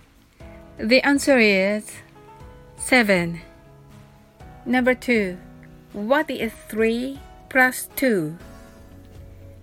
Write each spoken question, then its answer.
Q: What is 3 plus 2?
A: The answer is 5